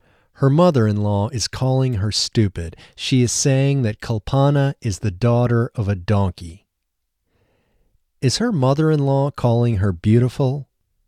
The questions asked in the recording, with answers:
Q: Is her mother-in-law calling her beautiful?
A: No, her mother-in-law isn't calling her beautiful.